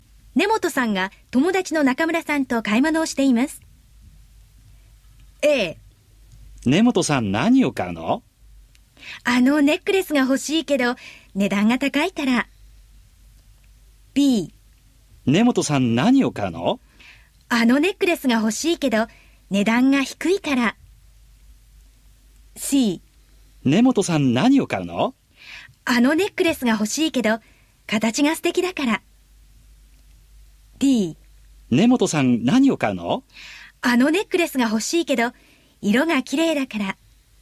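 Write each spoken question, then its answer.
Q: 本さんが友達の中村さんと買い物をしています。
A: A: あのネックレスが欲しいけど値段が高いから。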